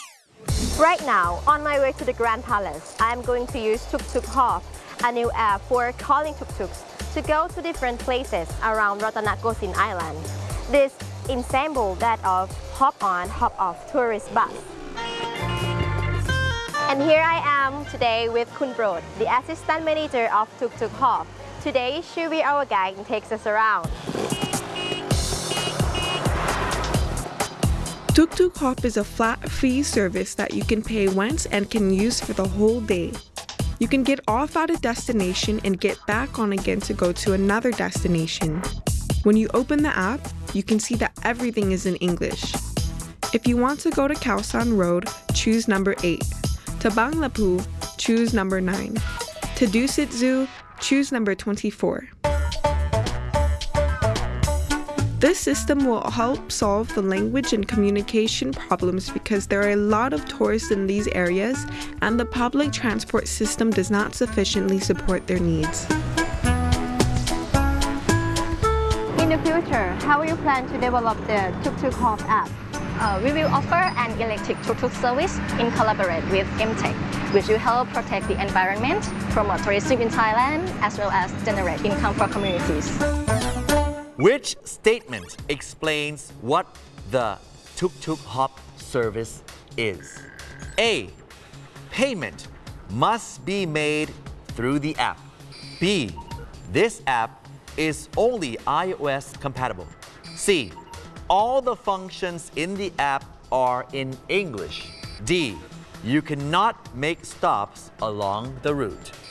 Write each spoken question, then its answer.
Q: Which statement explains what the Tuk Tuk Hop service is?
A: C. All the functions in the apps are in English.